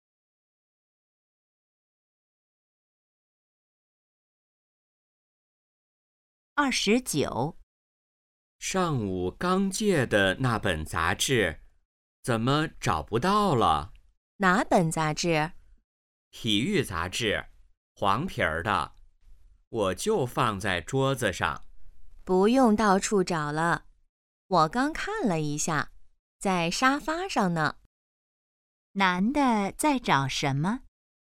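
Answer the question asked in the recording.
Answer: 体育杂志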